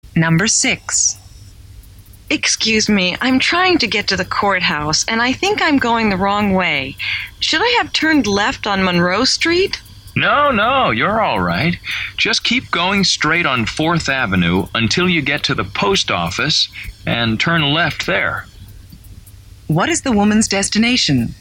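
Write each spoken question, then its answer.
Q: What is the woman's destination?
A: the courthouse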